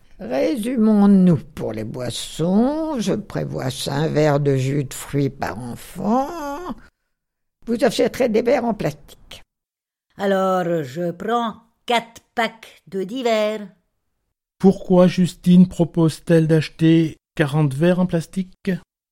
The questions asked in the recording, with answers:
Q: Pourquoi Justine propose-t-elle d'acheter 40 verres en plastique ?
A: Eh bien, Justine, vous pensez peut-être qu'ils vont changer de verre à chaque boisson.